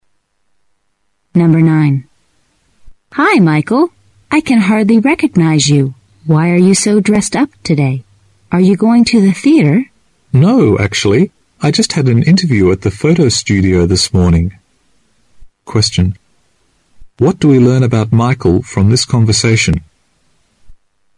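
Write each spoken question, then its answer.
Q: What do we learn about Michael from this conversation?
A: He had an interview at a photo studio.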